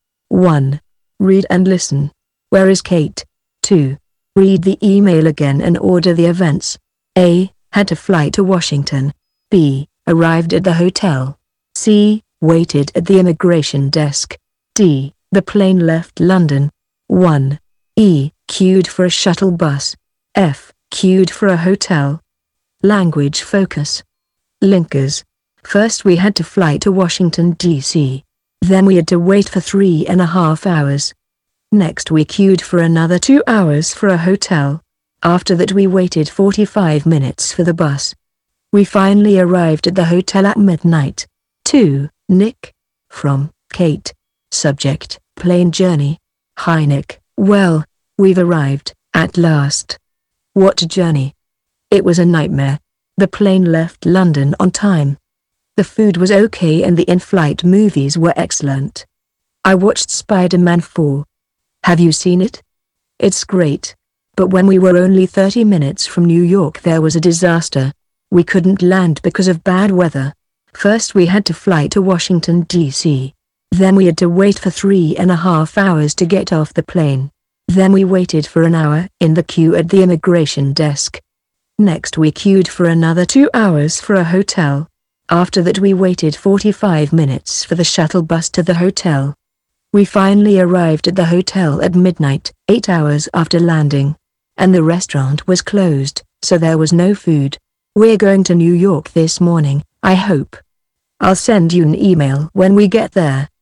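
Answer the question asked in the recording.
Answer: In a hotel in Washington, D.C.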